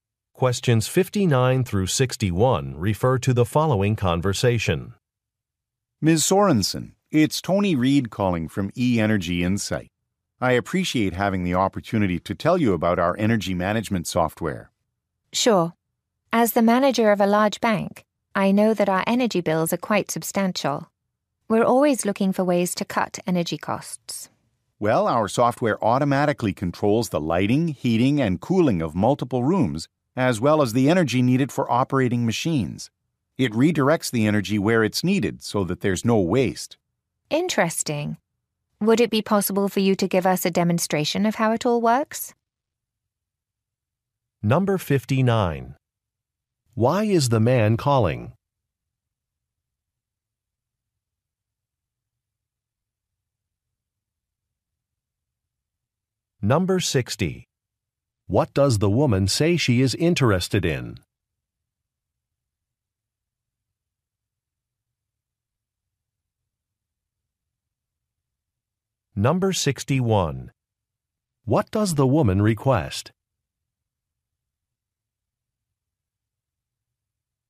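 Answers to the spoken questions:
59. To promote energy management software
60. Cutting energy costs
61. A demonstration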